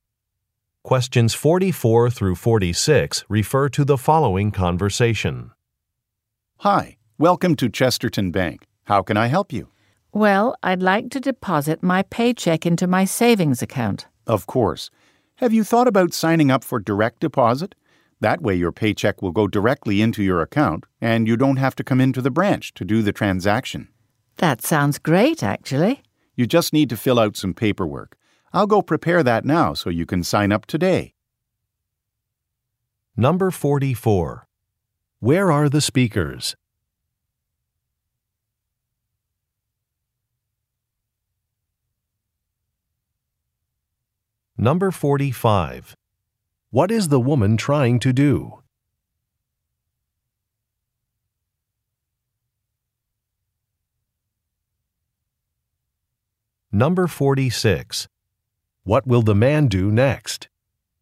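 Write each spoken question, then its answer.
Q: Where are the speakers?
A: At a bank

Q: What is the woman trying to do?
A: Deposit her paycheck

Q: What will the man do next?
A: Prepare some paperwork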